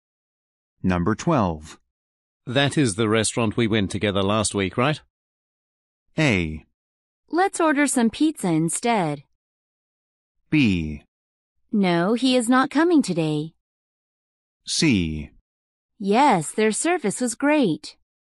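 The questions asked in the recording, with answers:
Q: That is the restaurant we went together last week, right?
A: C: Yes, their service was great.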